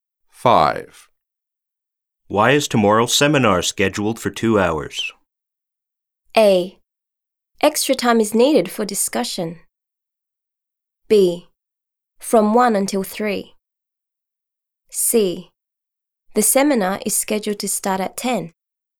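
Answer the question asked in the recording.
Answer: A: Extra time is needed for discussion.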